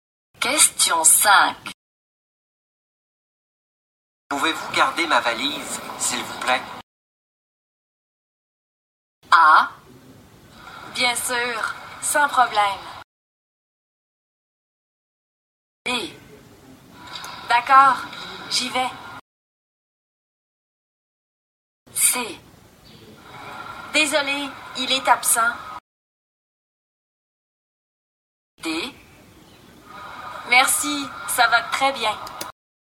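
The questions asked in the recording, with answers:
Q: Pouvez-vous garder ma valise, s'il vous plaît?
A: A: Bien sûr, sans problème.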